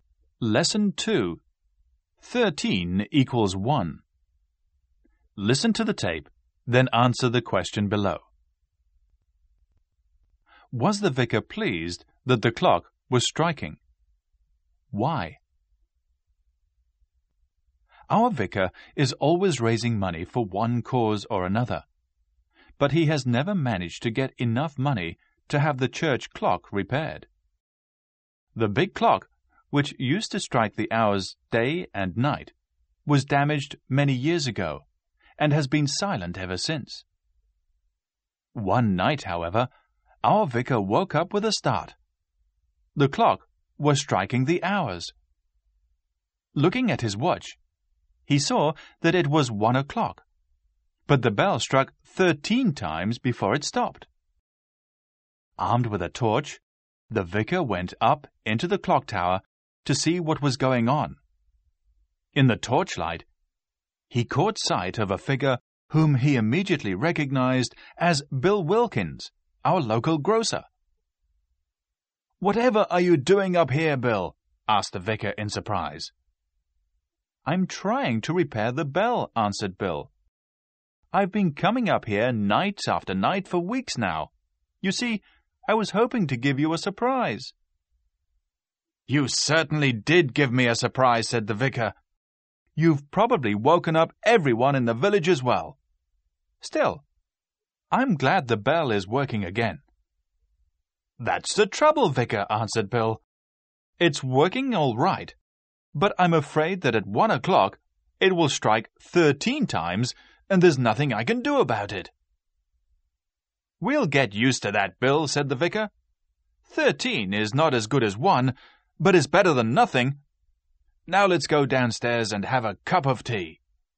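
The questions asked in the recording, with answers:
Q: Was the vicar pleased that the clock was striking?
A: Yes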